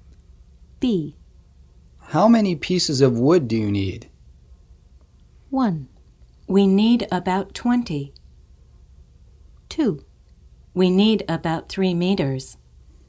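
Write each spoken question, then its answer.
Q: How many pieces of wood do you need?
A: 1: We need about 20.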